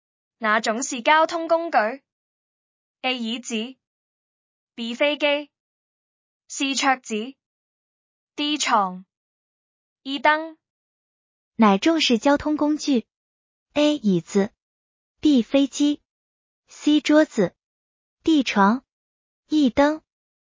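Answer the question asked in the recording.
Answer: B: 飞机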